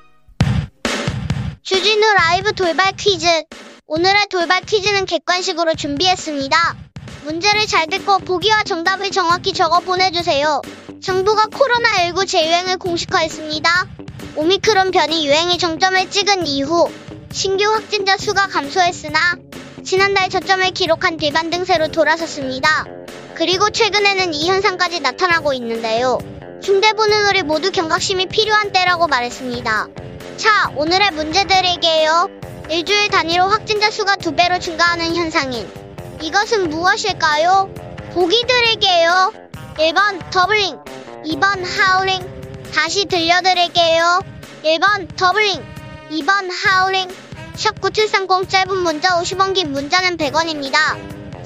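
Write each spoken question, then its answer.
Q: 일주일 단위로 확진자 수가 두 배로 증가하는 현상인 이것은 무엇일까요?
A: 1: 더블링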